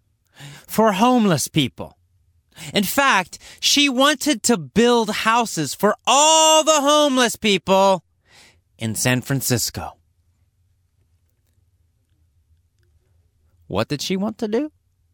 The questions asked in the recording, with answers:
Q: What did she want to do?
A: She wanted to build houses for all the homeless people in San Francisco.